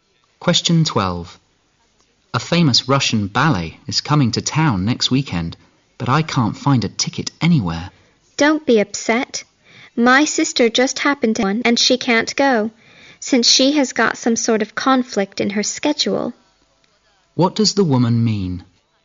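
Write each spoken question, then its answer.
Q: What does the woman mean?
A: Her sister has a ticket she can't use, which the man may get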